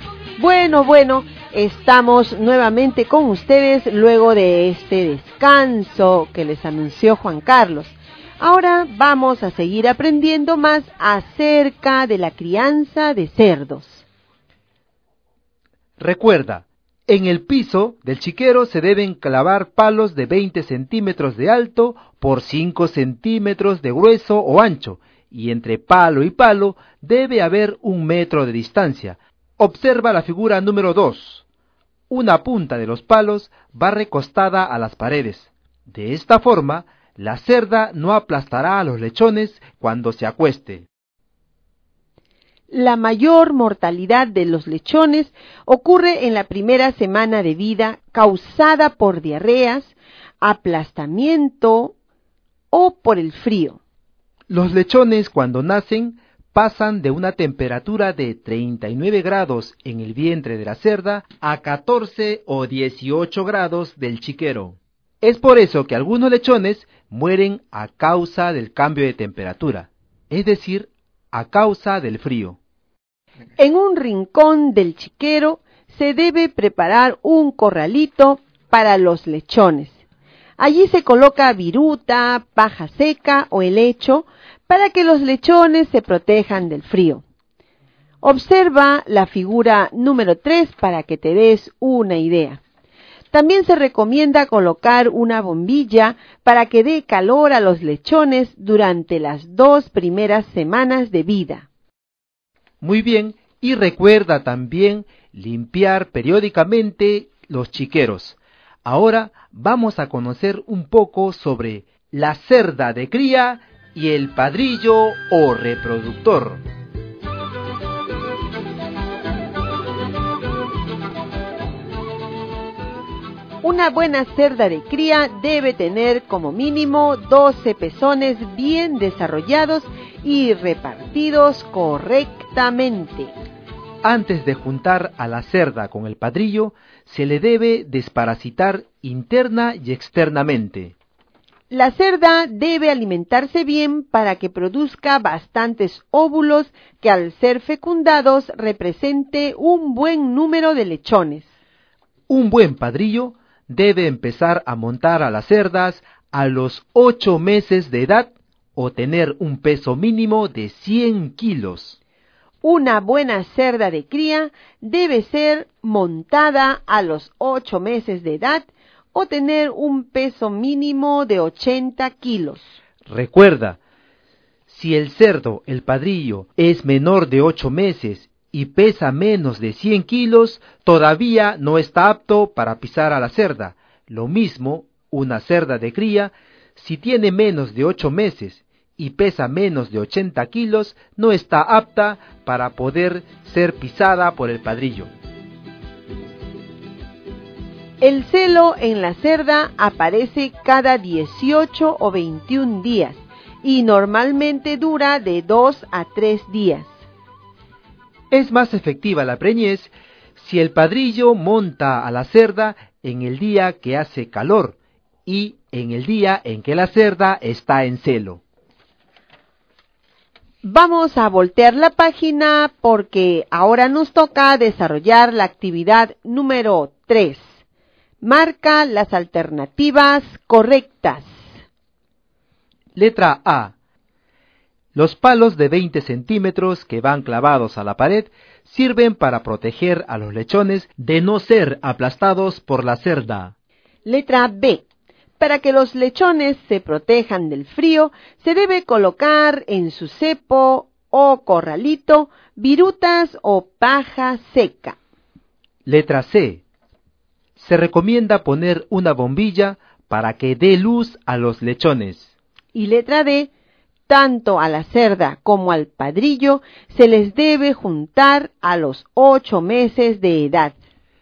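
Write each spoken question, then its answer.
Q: Letra B. Para que los lechones se protejan del frío, se debe colocar en su cepo o corralito virutas o paja seca.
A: Correcta

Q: Letra C. Se recomienda poner una bombilla para que dé luz a los lechones.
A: Incorrecta (es para dar calor)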